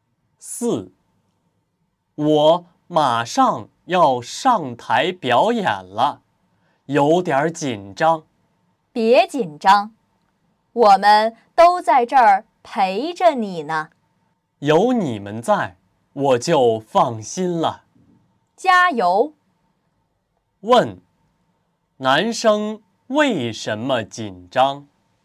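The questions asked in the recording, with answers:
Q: 问,男生为什么紧张?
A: 马上要上台表演了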